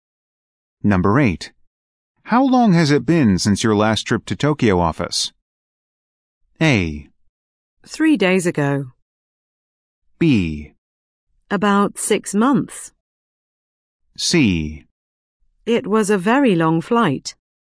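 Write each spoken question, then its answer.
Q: How long has it been since your last trip to Tokyo office?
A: B: About 6 months.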